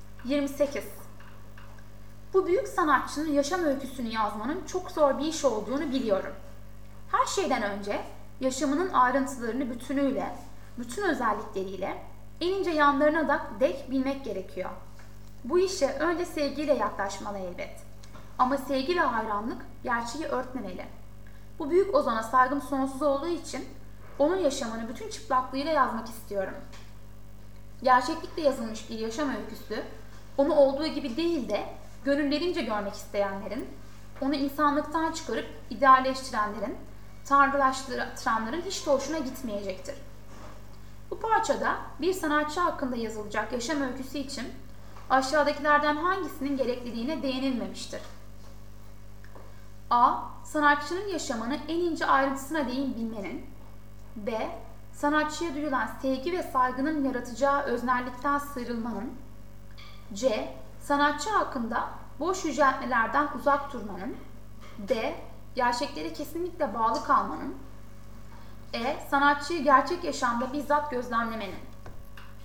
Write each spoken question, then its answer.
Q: Bu parçada bir sanatçı hakkında yazılacak yaşam öyküsü için aşağıdakilerden hangisinin gerekliliğine değinilmemiştir?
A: Doğru yanıt E.